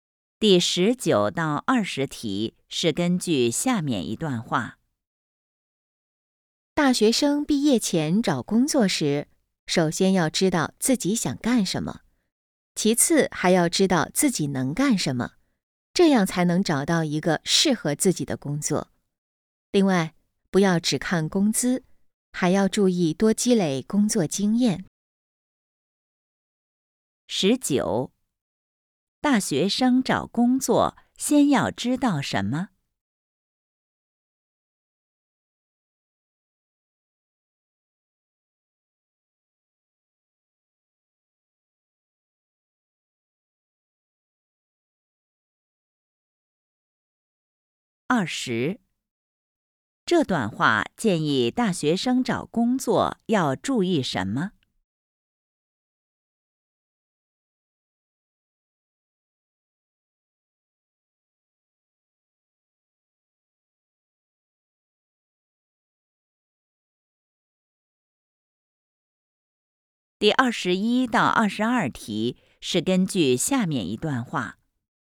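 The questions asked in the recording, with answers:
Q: 大学生找工作先要知道什么?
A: 自己想干什么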